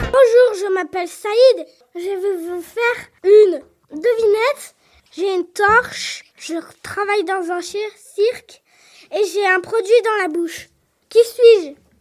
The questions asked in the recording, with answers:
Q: Qui suis-je ?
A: Un cracheur de feu.